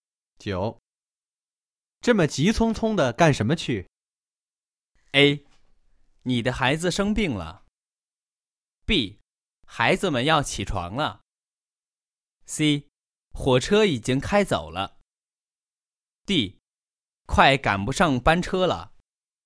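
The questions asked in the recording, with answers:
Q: 这么急匆匆的干什么去?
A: D: 快赶不上班车了。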